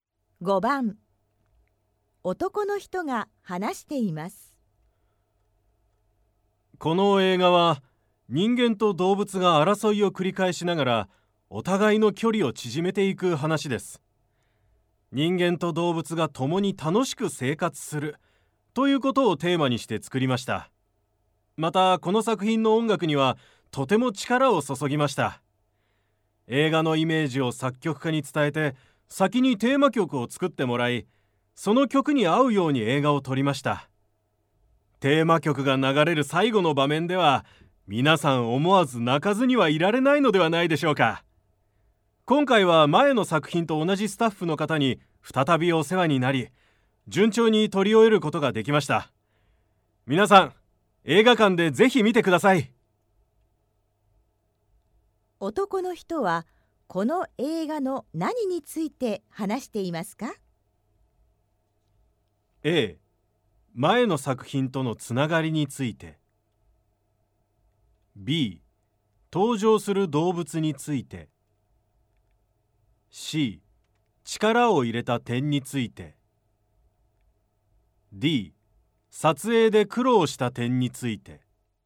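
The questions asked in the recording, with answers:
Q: 男の人は、この映画の何について話していますか?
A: C: 力を入れた点について。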